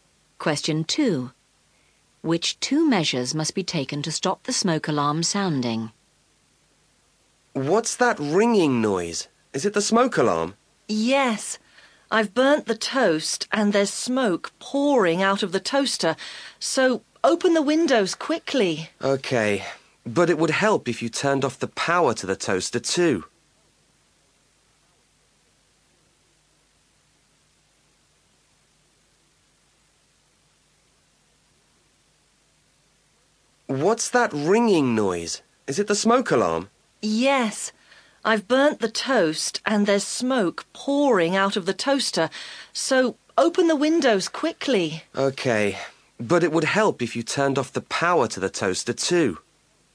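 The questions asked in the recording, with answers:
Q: Which two measures must be taken to stop the smoke alarm sounding?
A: Open the windows and turn off the power to the toaster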